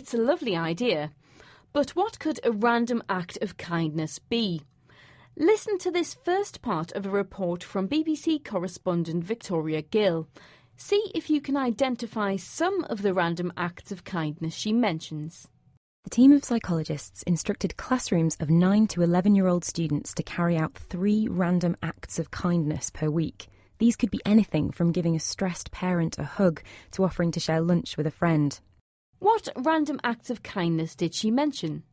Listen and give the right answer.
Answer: The first example given was giving a stressed parent a hug.